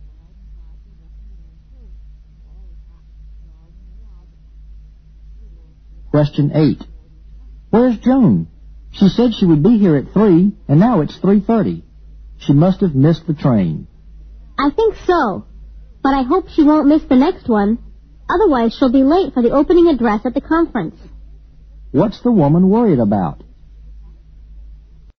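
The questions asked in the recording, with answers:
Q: What's the woman worried about?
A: That Joan will miss the next train and be late for the opening address at the conference.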